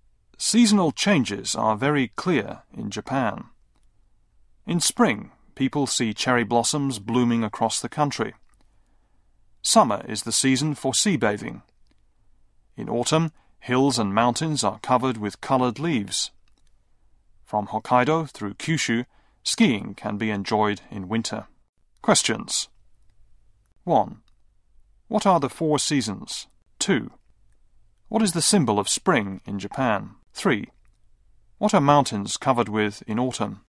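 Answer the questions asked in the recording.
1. Spring, summer, autumn and winter
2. Cherry blossoms
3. Colored leaves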